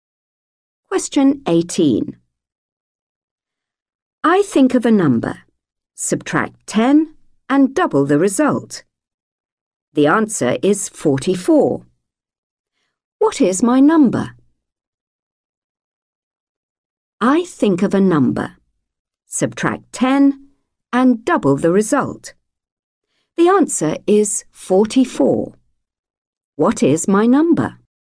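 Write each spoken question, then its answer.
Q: The answer is 44. What is my number?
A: 32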